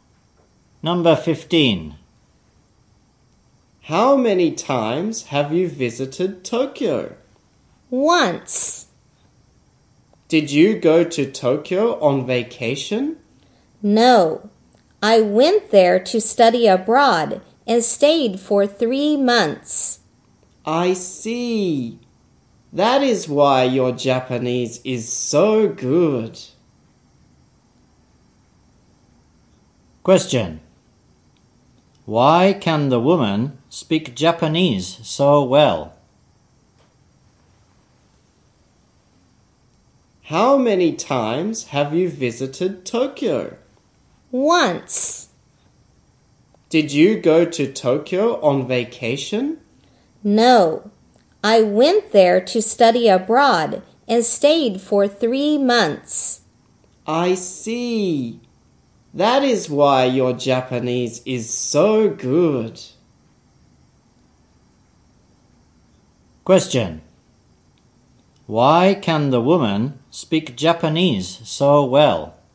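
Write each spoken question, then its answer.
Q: Why can the woman speak Japanese so well?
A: She studied abroad in Tokyo for 3 months.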